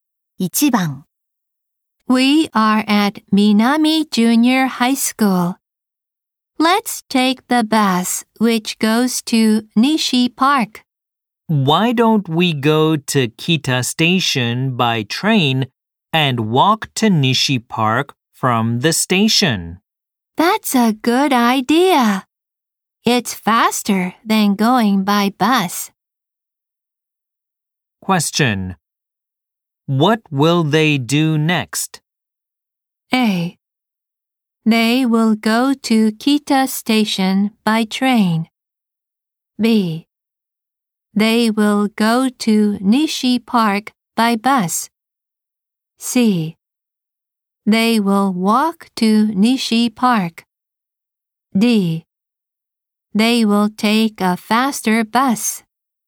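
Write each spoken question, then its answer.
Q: What will they do next?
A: A: They will go to Kita Station by train.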